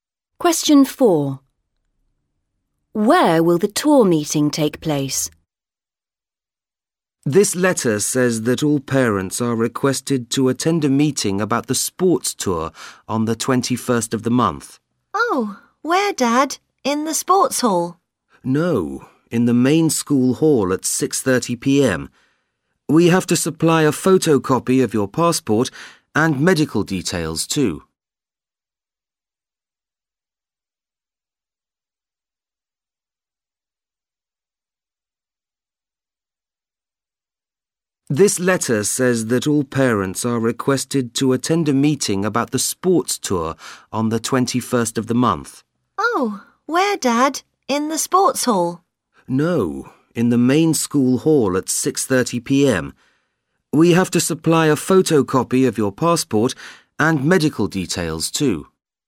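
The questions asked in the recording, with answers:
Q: Where will the tour meeting take place?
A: In the main school hall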